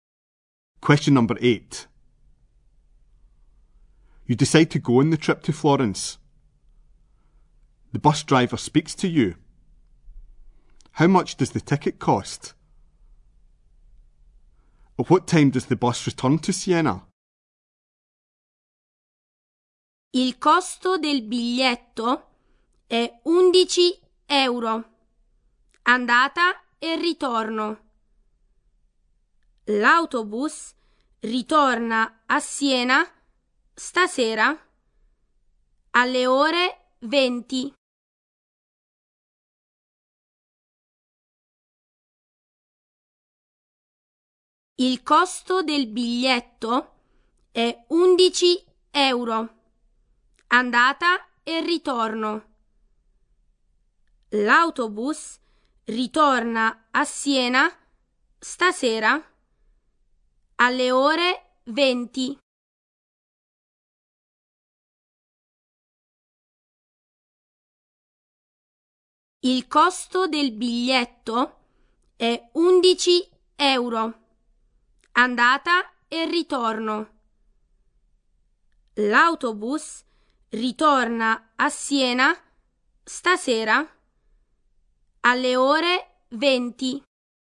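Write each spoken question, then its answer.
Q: How much does the ticket cost?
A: 11 euros return

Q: At what time does the bus return to Siena?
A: 8 pm (20:00) this evening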